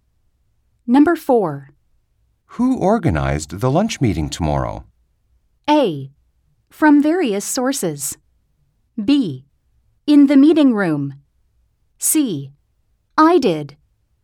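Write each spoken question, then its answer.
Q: Who organized the lunch meeting tomorrow?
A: C: I did.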